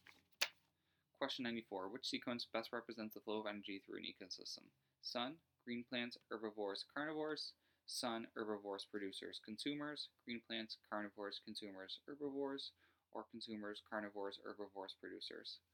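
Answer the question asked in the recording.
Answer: 1: Sun, green plants, herbivores, carnivores.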